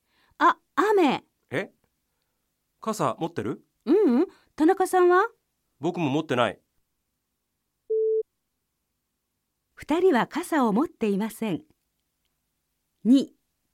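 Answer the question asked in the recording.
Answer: 正しい(はい)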